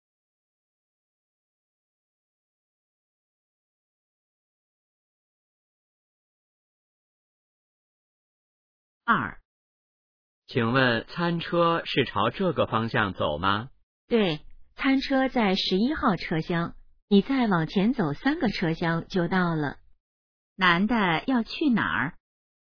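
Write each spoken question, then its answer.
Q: 男的要去哪儿?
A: 餐车(11号车厢)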